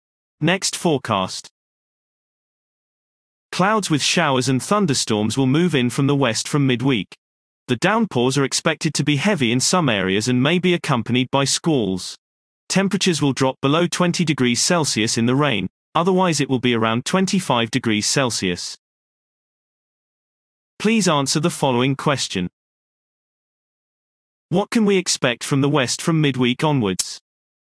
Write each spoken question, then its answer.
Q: What can we expect from the west from midweek onwards?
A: Clouds with showers and thunderstorms will move in from the west from midweek.